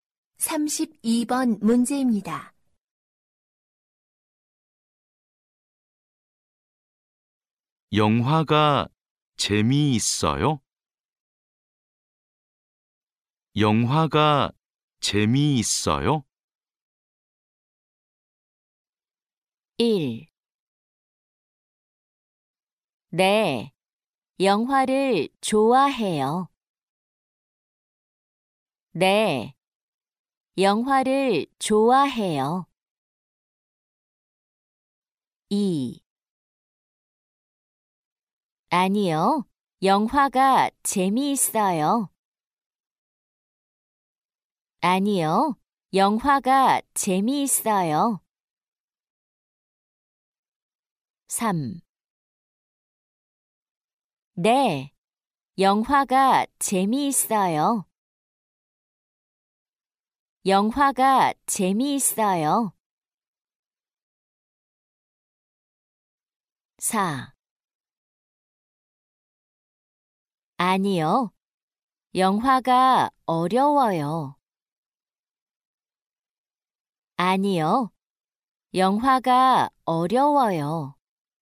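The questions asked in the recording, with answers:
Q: 영화가 재미있어요?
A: 3: 네, 영화가 재미있어요.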